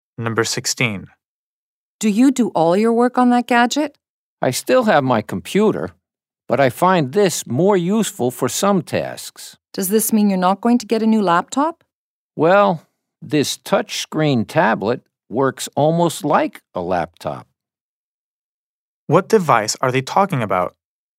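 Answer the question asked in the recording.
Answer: A touchscreen tablet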